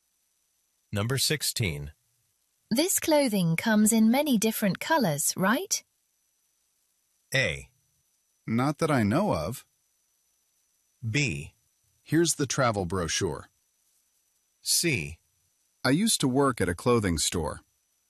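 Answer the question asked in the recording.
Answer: A: Not that I know of.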